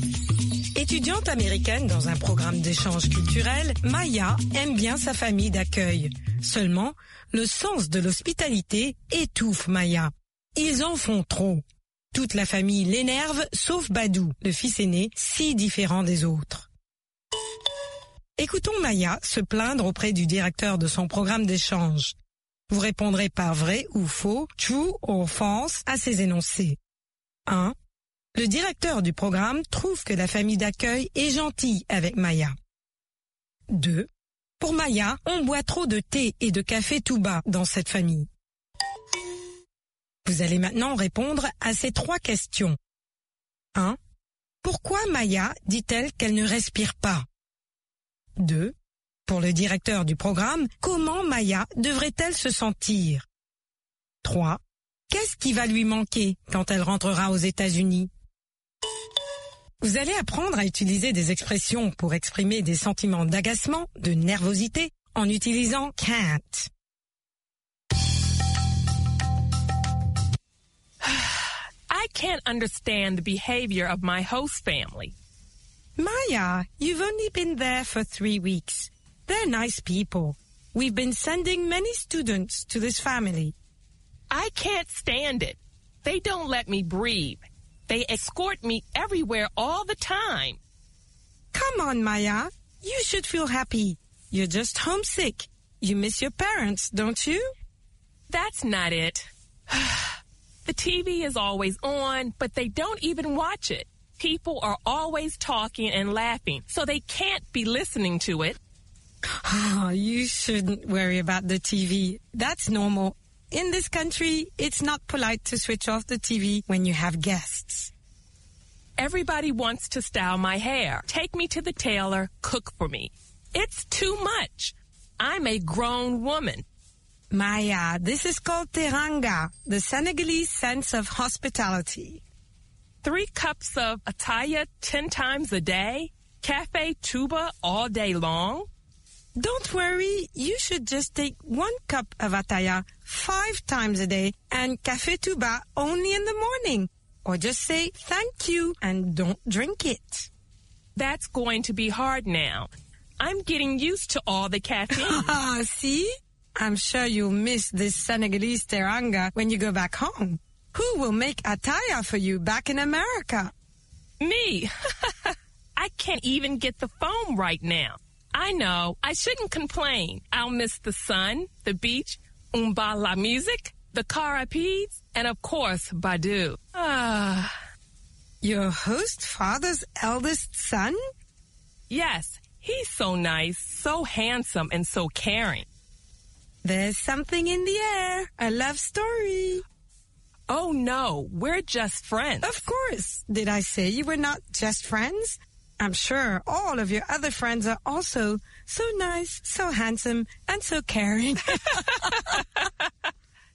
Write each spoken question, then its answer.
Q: Le directeur du programme trouve que la famille d'accueil est gentille avec Maya.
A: L'énoncé 1 est vrai.

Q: Pour Maya, on boit trop de thé et de café tout bas dans cette famille.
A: L'énoncé 2 est vrai.

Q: Pourquoi Maya dit-elle qu'elle ne respire pas?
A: Parce qu'on l'escorte toujours, partout.

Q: Pour le directeur du programme, comment Maya devrait-elle se sentir?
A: Heureuse.